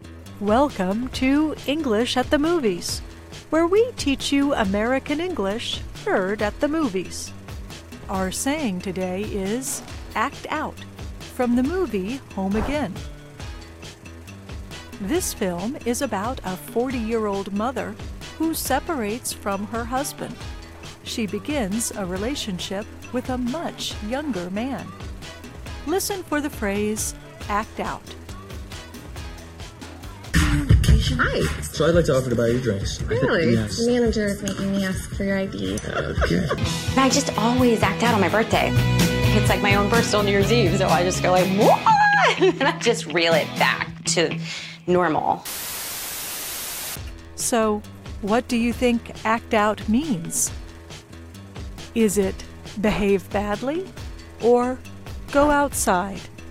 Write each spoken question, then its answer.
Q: So, what do you think act out means? Is it behave badly or go outside?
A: To act out means to behave badly, often as a way to deal with emotional stress.